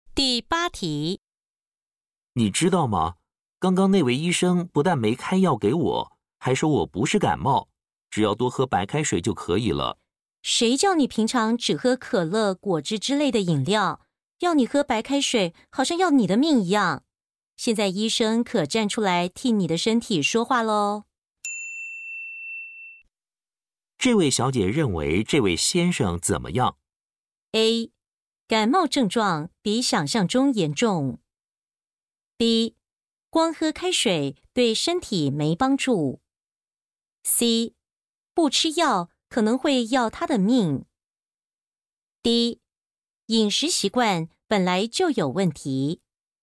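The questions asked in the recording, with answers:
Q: 这位小姐认为这位先生怎么样?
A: D: 饮食习惯本来就有问题。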